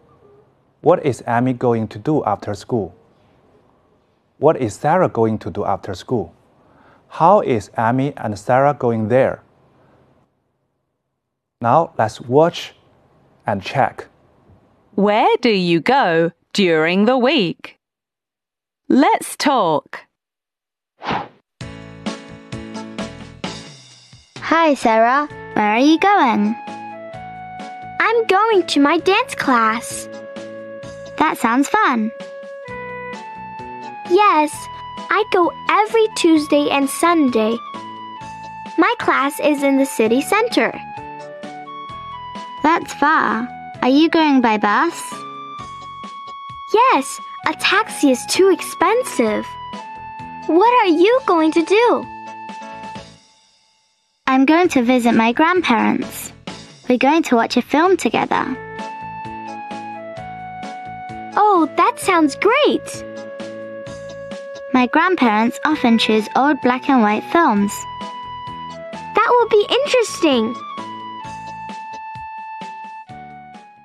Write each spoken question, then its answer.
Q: What is Amy going to do after school?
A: Amy is going to visit her grandparents.

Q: What is Sarah going to do after school?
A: Sarah is going to her dance class.